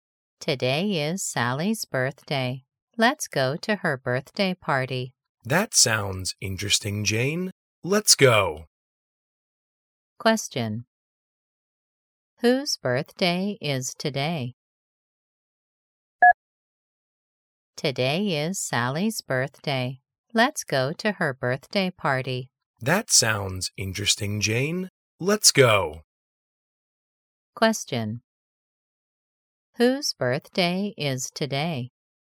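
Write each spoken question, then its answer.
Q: Whose birthday is today?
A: Sally's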